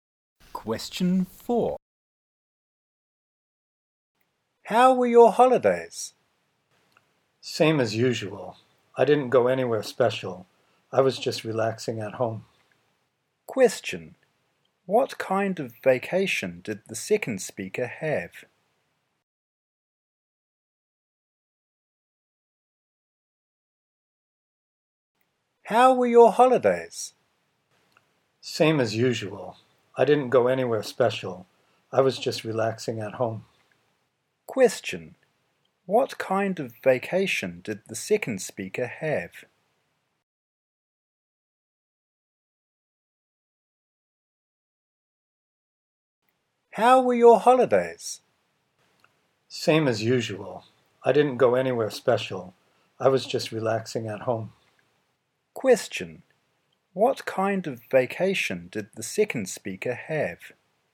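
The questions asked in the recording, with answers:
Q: What kind of vacation did the second speaker have?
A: A usual, relaxing one at home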